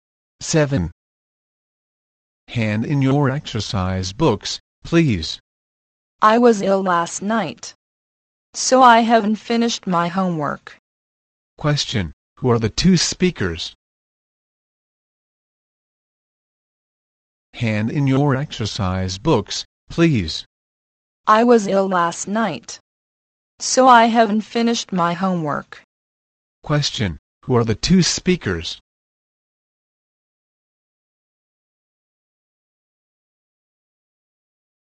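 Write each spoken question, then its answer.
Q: Question, who are the two speakers?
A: A teacher and a student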